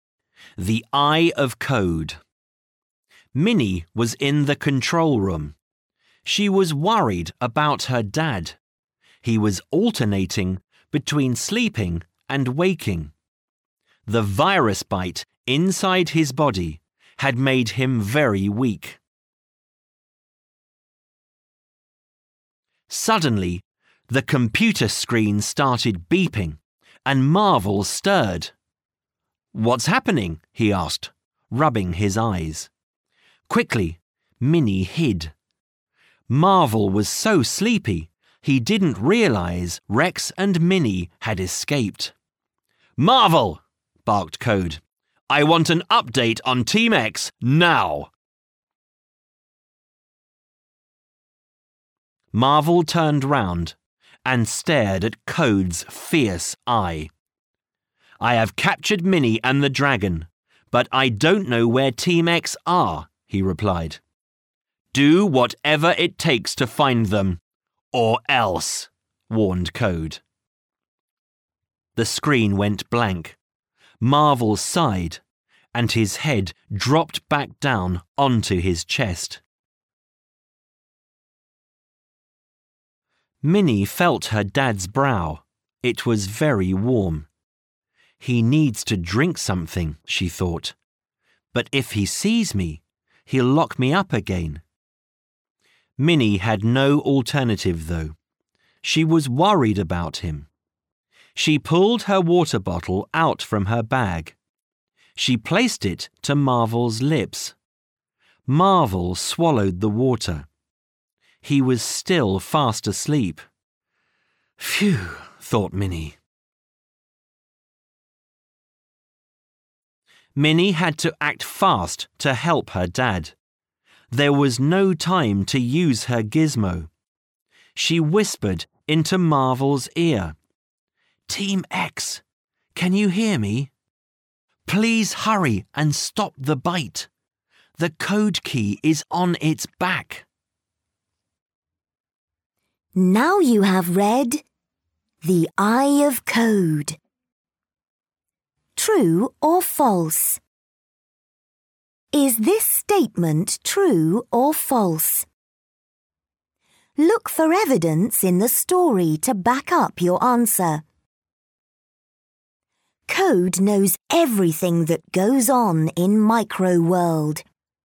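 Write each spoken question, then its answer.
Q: Code knows everything that goes on in Micro World.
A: False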